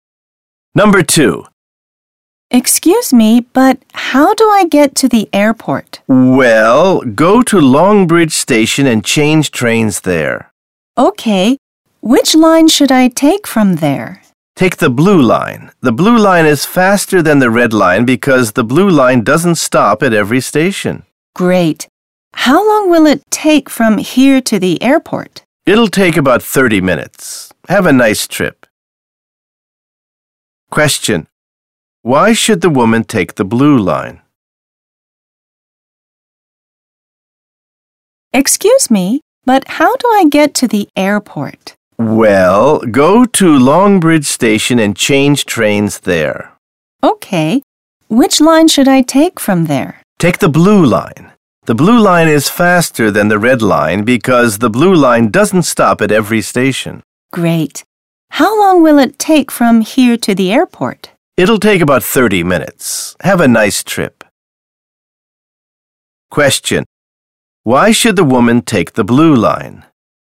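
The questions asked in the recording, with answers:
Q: Why should the woman take the blue line?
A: Because it is faster; it doesn't stop at every station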